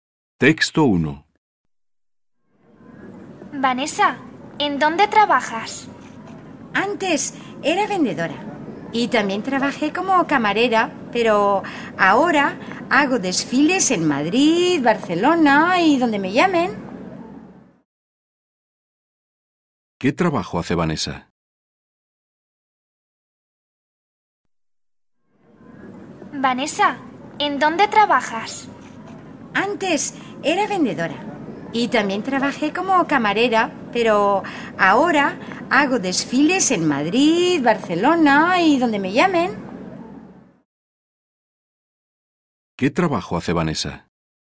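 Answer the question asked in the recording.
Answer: Es modelo (hace desfiles)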